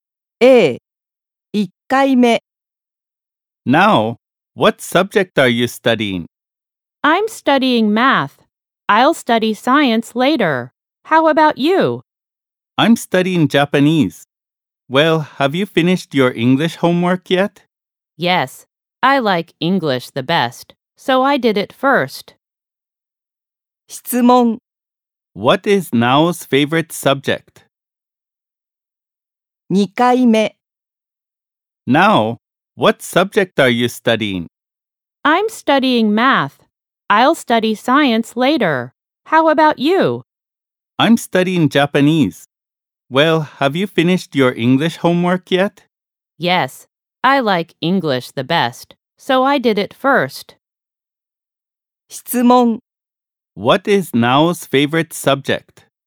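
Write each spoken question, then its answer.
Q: What is Nao's favorite subject?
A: English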